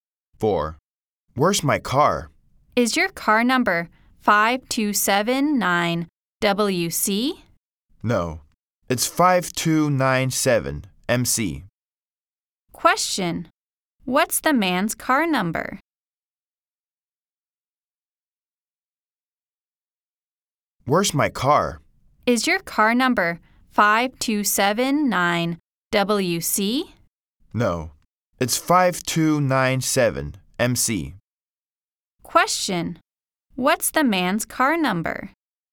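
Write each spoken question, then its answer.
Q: Question, what's the man's car number?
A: 5297MC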